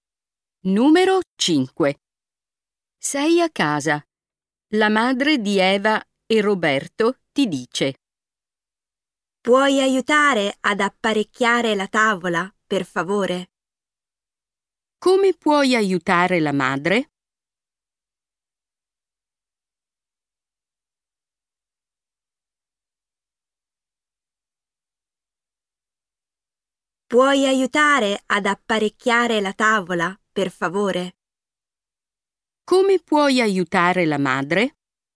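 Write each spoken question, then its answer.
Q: Come puoi aiutare la madre?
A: Apparecchiando la tavola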